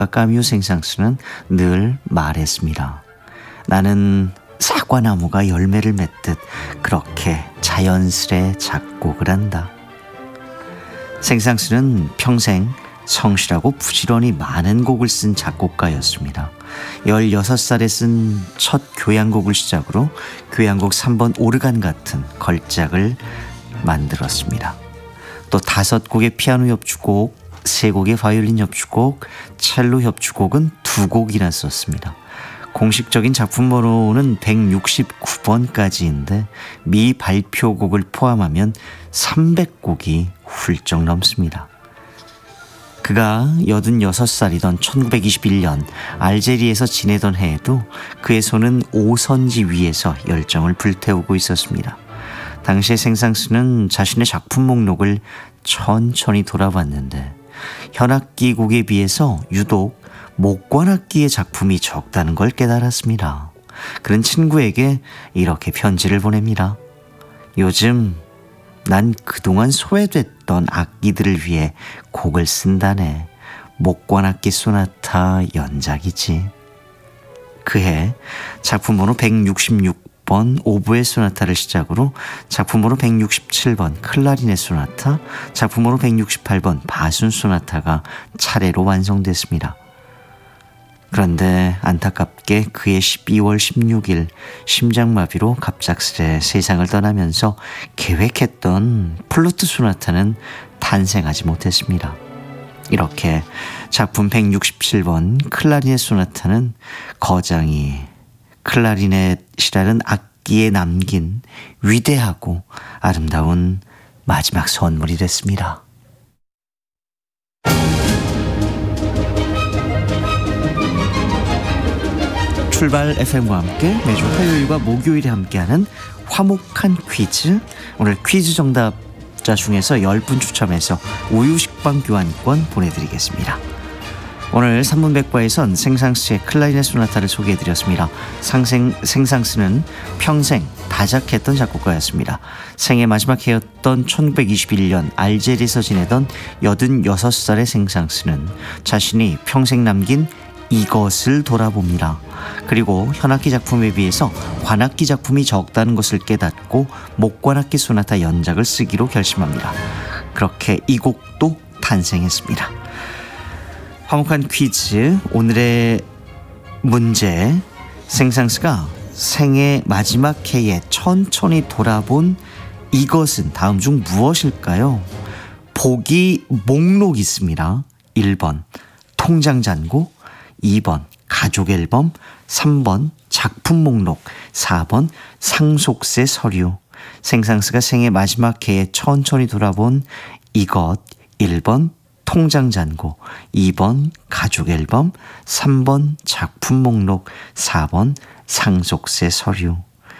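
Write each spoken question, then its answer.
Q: 생상수가 생애 마지막 해에 천천히 돌아본 이것은 다음 중 무엇일까요?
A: 3: 작품 목록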